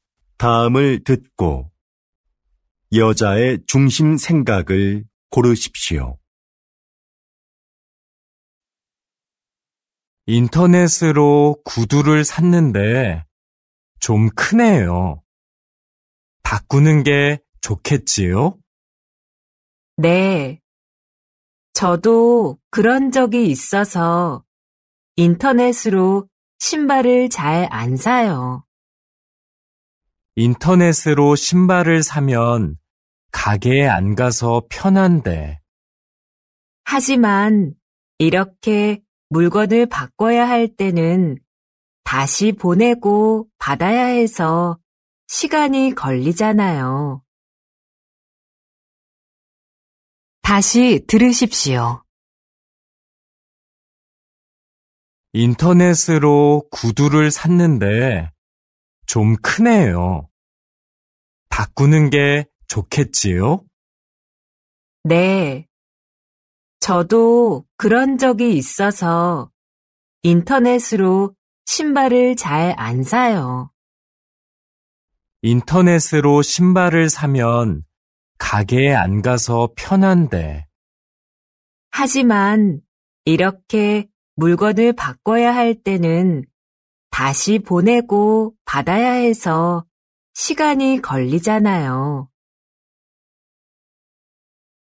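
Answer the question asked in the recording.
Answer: 인터넷으로 신발을 사면 교환할 때 시간이 걸려서 불편하다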